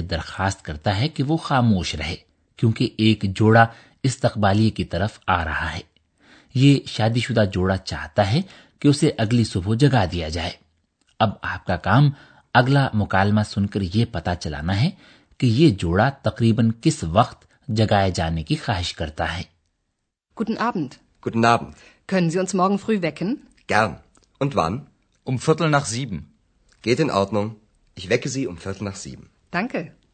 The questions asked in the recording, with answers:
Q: اب آپ کا کام اگلا مکالمہ سن کر یہ پتا چلانا ہے کہ یہ جوڑا تقریباً کس وقت جگائے جانے کی خواہش کرتا ہے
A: یہ شادی شدہ جوڑا چاہتا ہے کہ اسے تقریباً سات بجے جگا دیا جائے بلکہ زیادہ قطعی طور پر یہ کہ اسے سوا سات بجے جگا دیا جائے